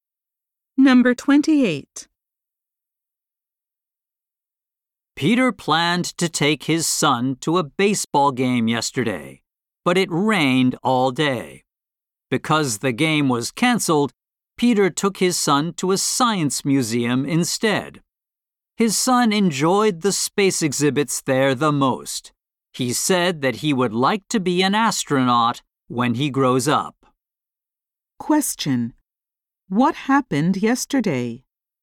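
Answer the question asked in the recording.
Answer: The baseball game was canceled because of rain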